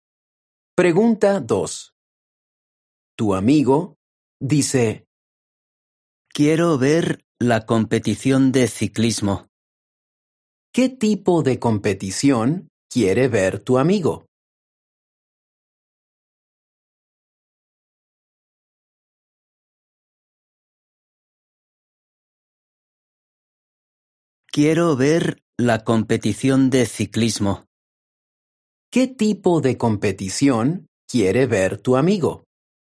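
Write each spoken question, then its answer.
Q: ¿Qué tipo de competición quiere ver tu amigo?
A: De ciclismo.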